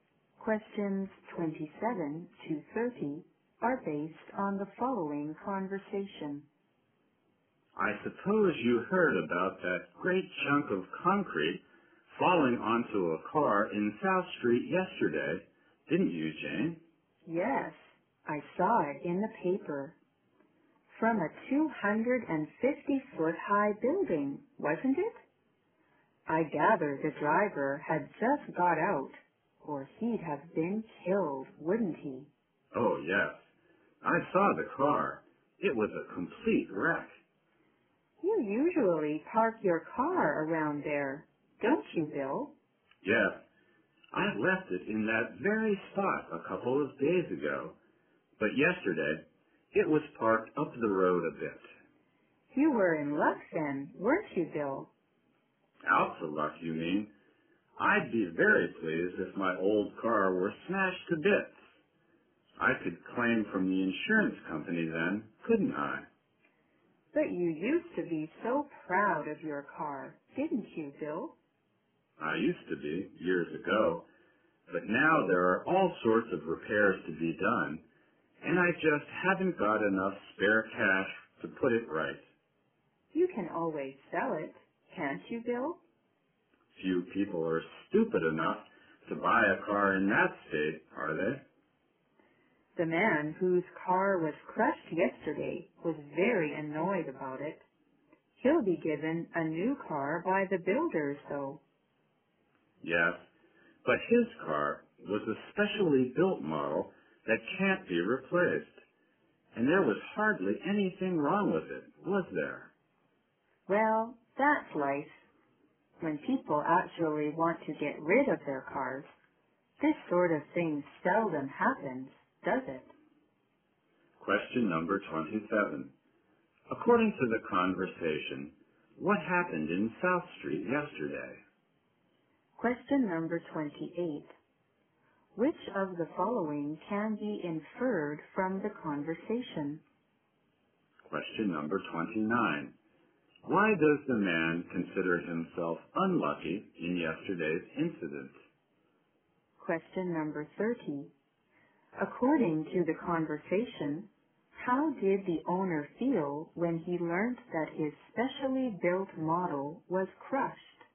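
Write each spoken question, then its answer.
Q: According to the conversation, what happened in South Street yesterday?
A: A large chunk of concrete fell onto a car

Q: Why does the man consider himself unlucky in yesterday's incident?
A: His old car wasn't smashed, so he can't claim from the insurance company

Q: According to the conversation, how did the owner feel when he learned that his specially built model was crushed?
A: Very annoyed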